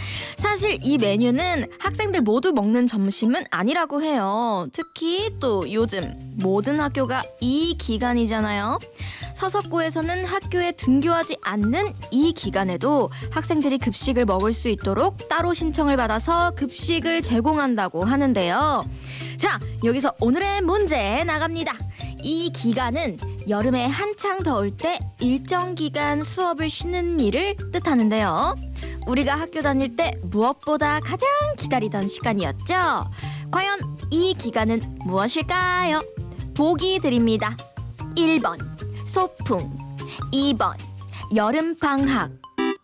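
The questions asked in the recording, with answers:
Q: 과연 이 기간은 무엇일까요? 보기 드립니다. 1번 소풍, 2번 여름방학.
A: 2: 여름방학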